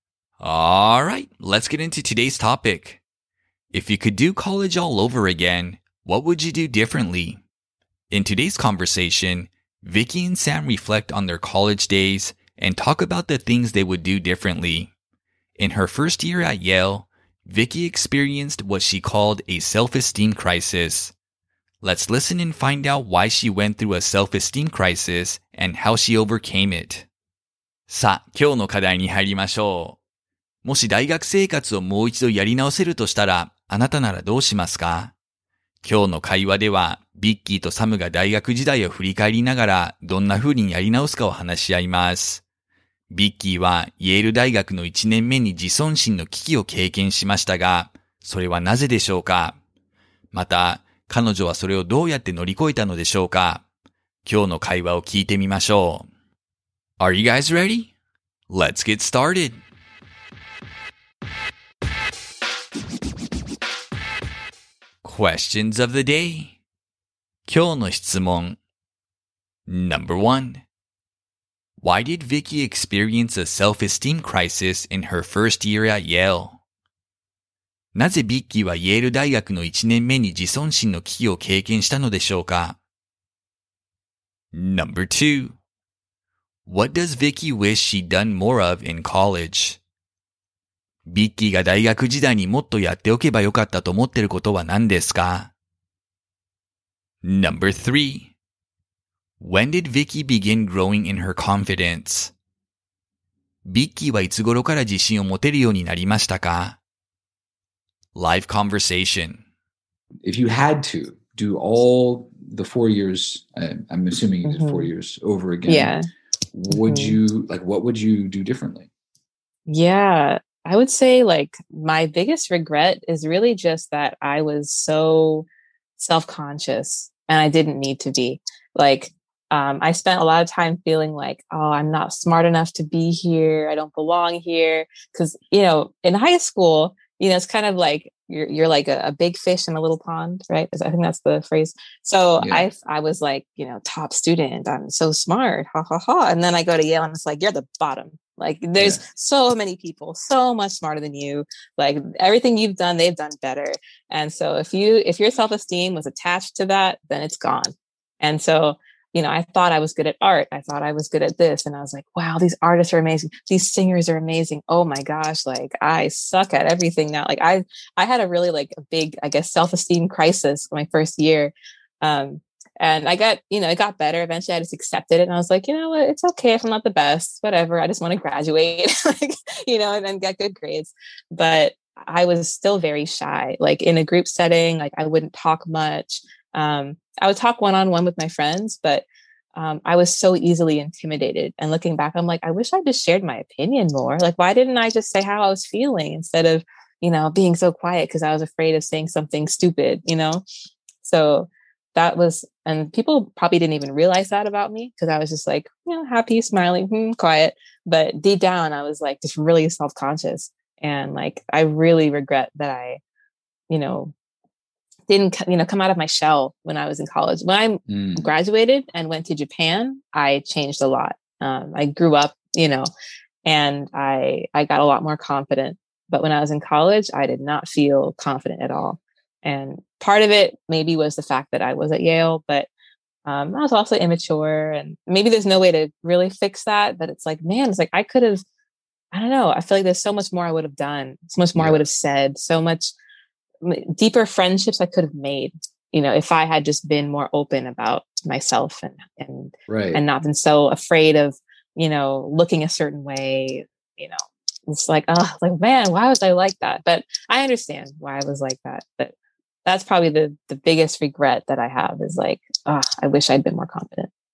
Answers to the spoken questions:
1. She felt that everyone around her was smarter than her and that she didn't belong at Yale.
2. She wishes she'd had the confidence to express her opinions more frequently.
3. She began growing in confidence after she moved to Japan.